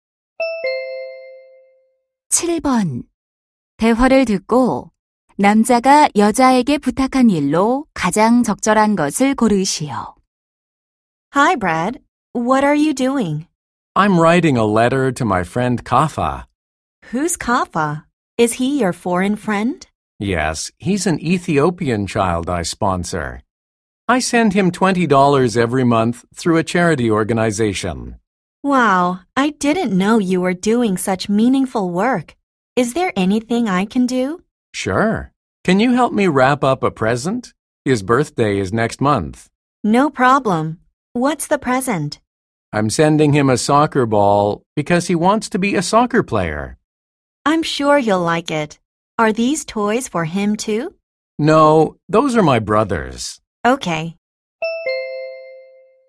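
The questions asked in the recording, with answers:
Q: 대화를 듣고 남자가 여자에게 부탁한 일로 가장 적절한 것을 고르시오.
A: 선물 포장 도와주기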